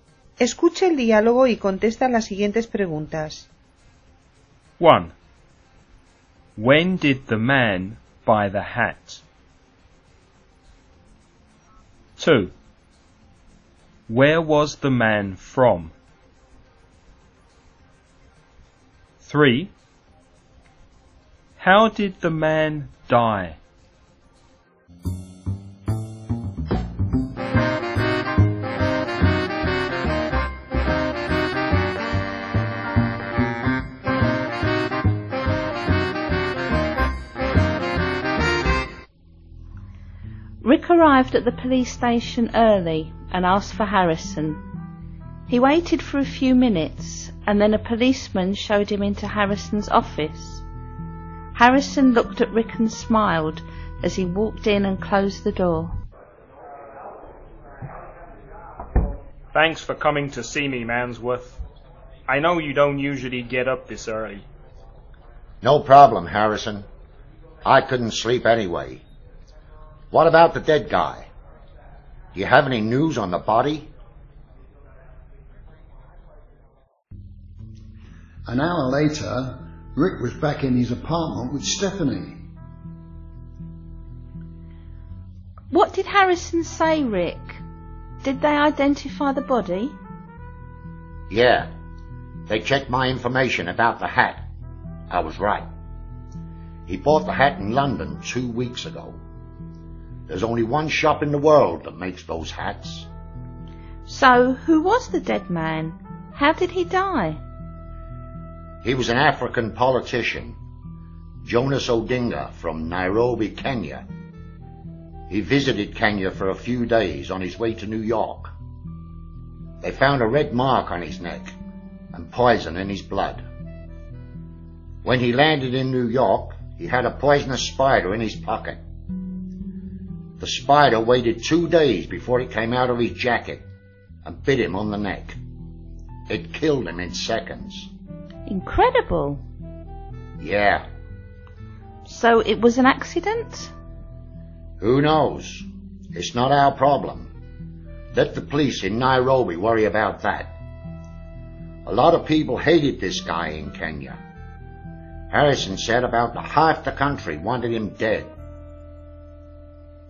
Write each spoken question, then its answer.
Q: When did the man buy the hat?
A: 2 weeks ago.

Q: Where was the man from?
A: He was from Nairobi, Kenya.

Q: How did the man die?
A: A poisonous spider bit him.